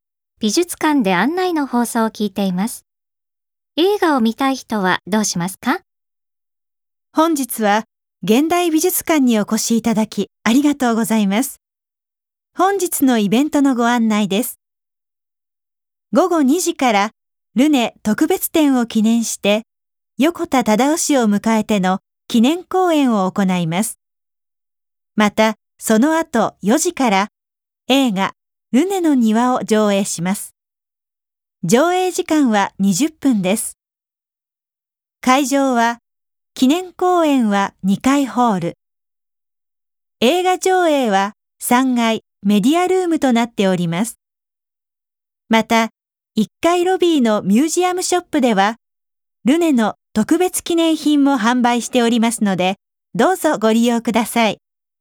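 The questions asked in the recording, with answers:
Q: 映画を見たい人はどうしますか?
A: 4時に3階のメディアルームへ行く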